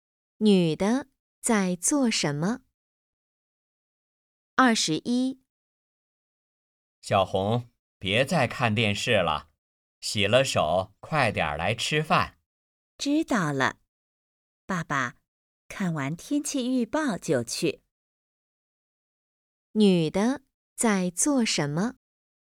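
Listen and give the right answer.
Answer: 看电视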